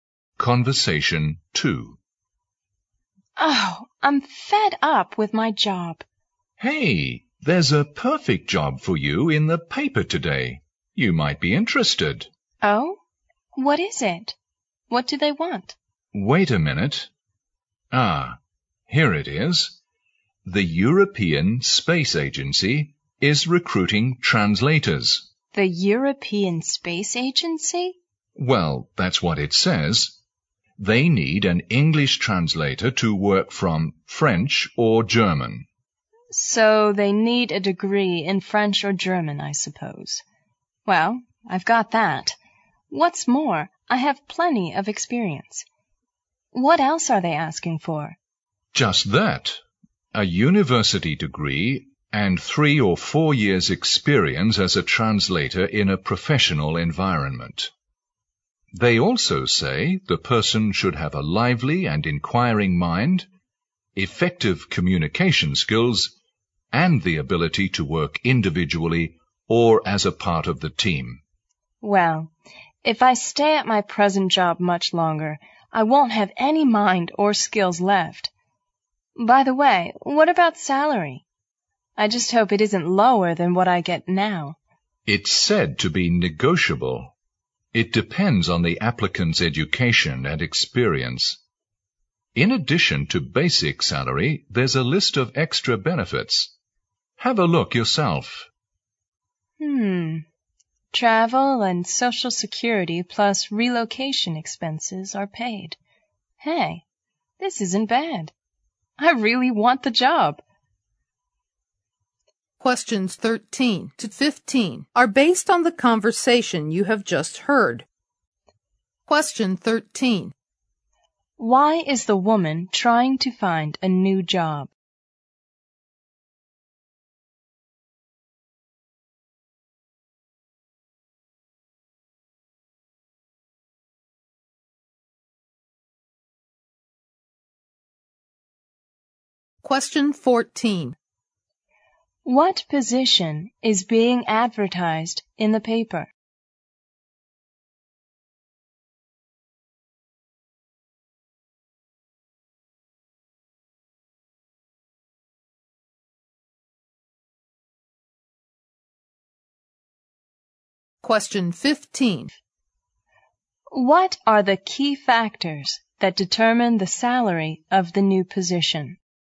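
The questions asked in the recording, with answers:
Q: Why is the woman trying to find a new job?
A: She is fed up with her present job.

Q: What position is being advertised in the paper?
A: An English translator at the European Space Agency.

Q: What are the key factors that determine the salary of the new position?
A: The applicant's education and experience.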